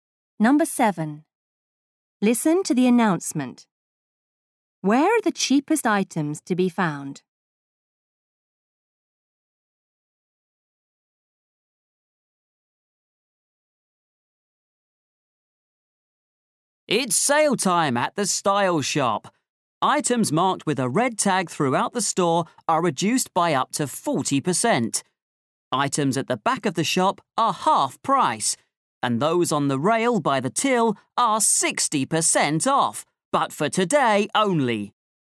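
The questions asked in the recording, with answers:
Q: Where are the cheapest items to be found?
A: On the rail by the till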